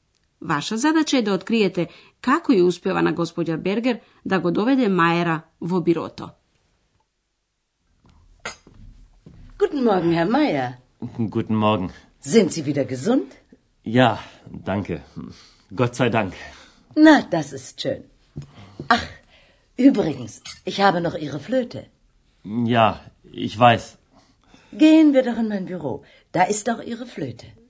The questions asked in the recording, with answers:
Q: Ваша задача е да откриете како ја успева на господја Бергер да го доведе Мајера во бирото.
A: Господја Бергер ја има флейтата на господин Мајер.